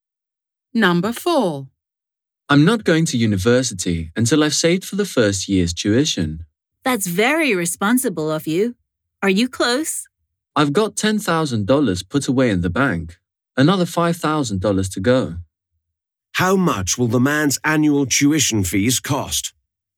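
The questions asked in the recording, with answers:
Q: How much will the man's annual tuition fees cost?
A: $15,000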